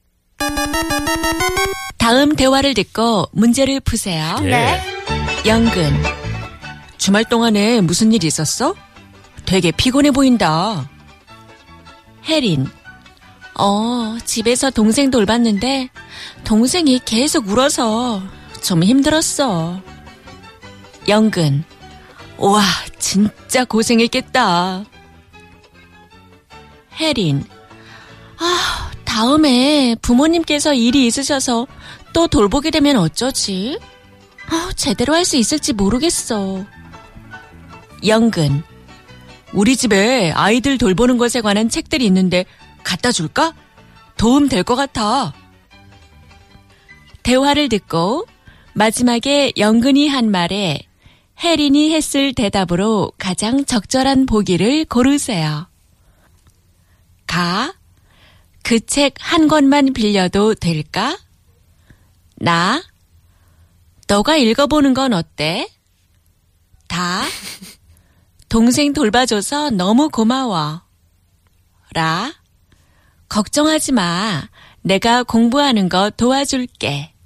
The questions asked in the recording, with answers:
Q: 대화를 듣고 마지막에 영근이 한 말에 혜린이 했을 대답으로 가장 적절한 보기를 고르세요.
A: 가, 그 책 한 권만 빌려도 될까?